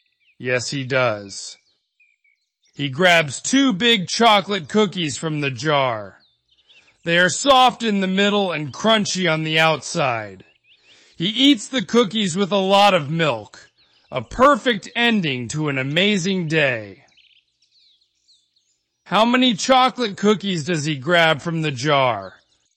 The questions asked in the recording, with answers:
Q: How many chocolate cookies does he grab from the jar?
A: Two. He grabs two chocolate cookies.